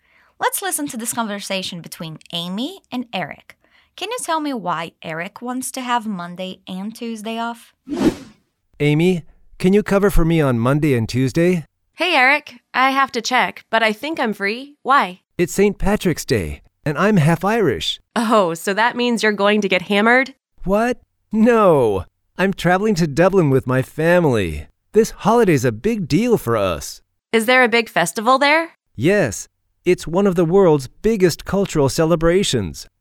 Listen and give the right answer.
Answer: It sounds like he's going on a trip to Ireland.